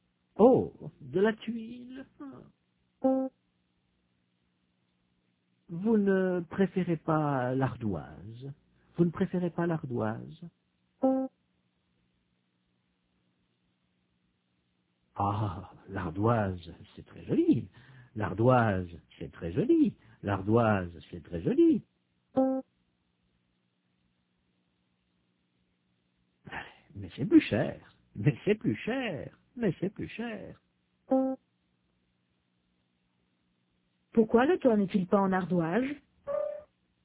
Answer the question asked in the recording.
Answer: Parce que l'ardoise, c'est plus cher.